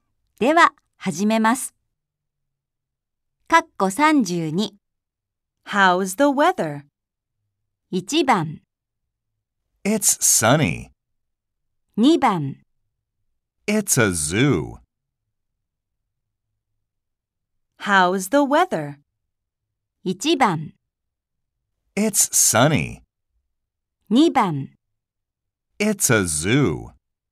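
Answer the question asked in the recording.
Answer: 1: It's sunny.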